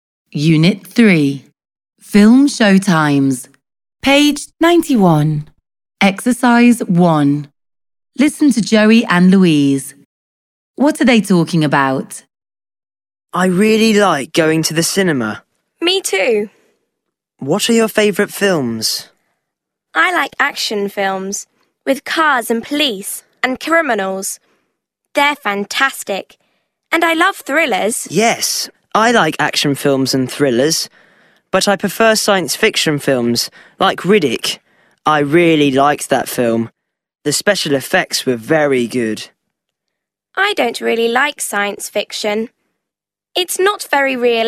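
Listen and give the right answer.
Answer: Films / the kinds of films they like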